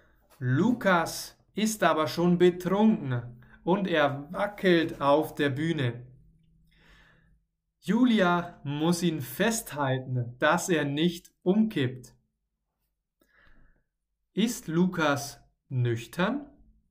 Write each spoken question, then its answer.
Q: Ist Lukas nüchtern?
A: Nein, er ist nicht lüchtern, er ist betrunken.